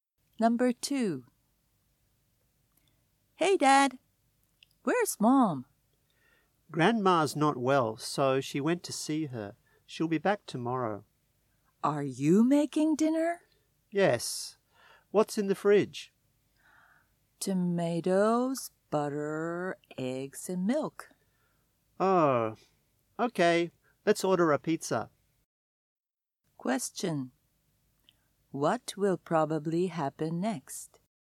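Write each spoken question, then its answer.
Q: What will probably happen next?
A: They will order a pizza.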